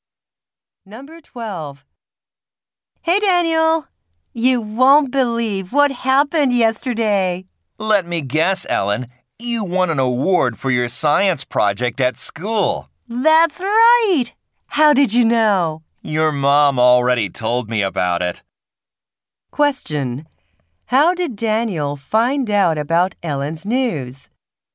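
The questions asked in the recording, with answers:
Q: How did Daniel find out about Ellen's news?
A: Ellen's mom told him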